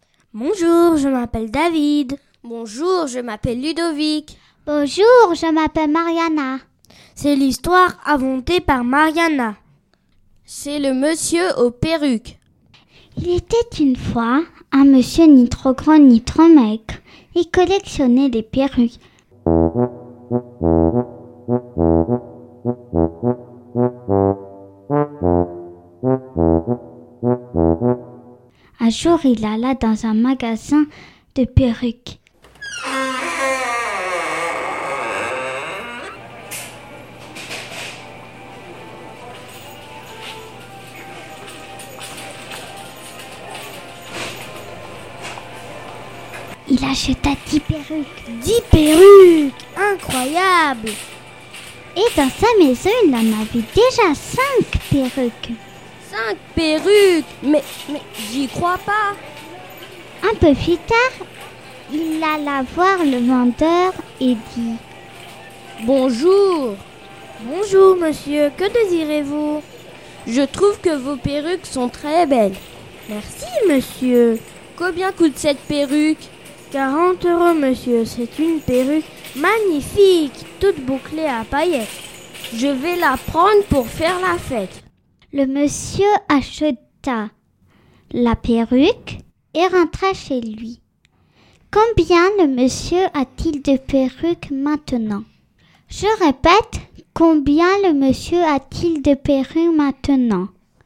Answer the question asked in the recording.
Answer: Le monsieur a donc 16 perruques.